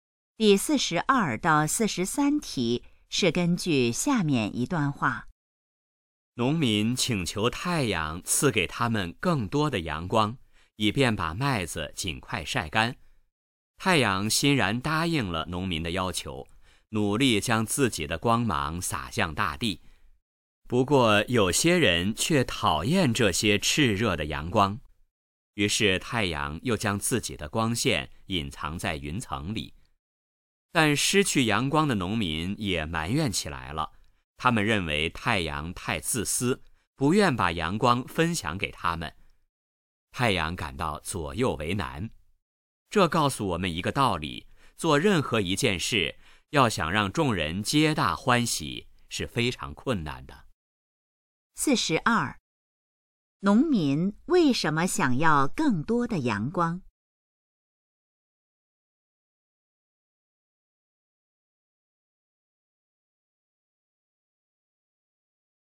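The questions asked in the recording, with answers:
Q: 农民为什么想要更多的阳光?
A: 为了尽快把麦子晒干

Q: 失去阳光后,农民是什么反应?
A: 埋怨太阳自私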